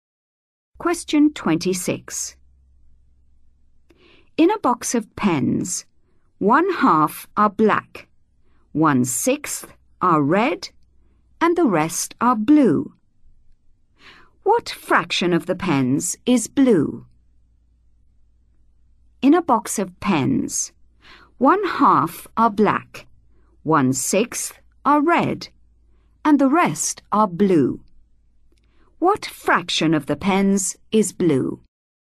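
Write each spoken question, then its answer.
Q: What fraction of the pens is blue?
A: 1/3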